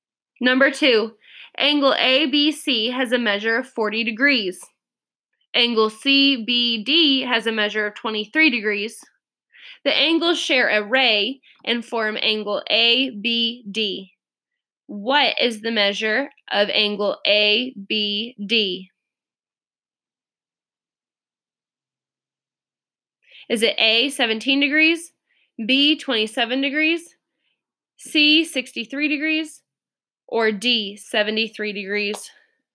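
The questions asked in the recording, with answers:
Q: What is the measure of angle ABD?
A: C: 63 degrees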